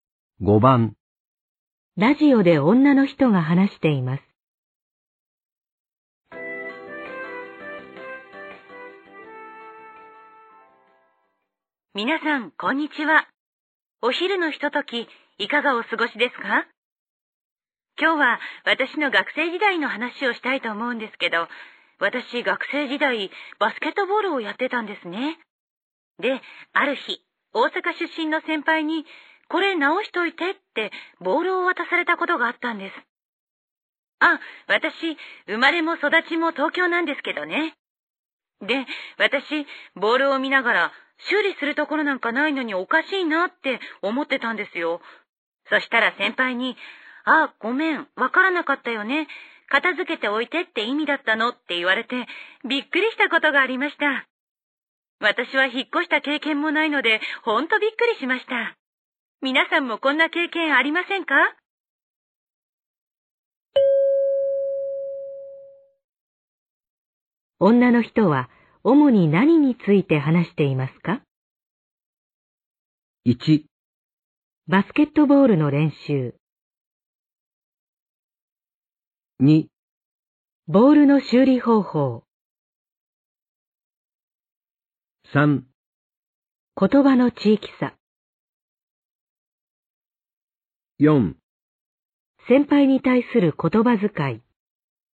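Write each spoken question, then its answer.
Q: 女の人は主に何について話していますか?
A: 3: 言葉の地域差。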